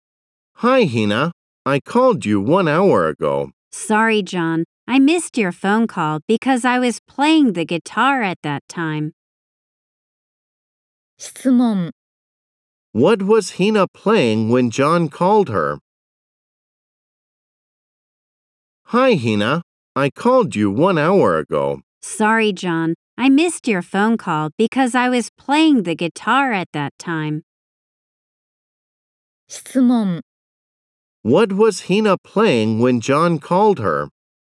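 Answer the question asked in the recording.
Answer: The guitar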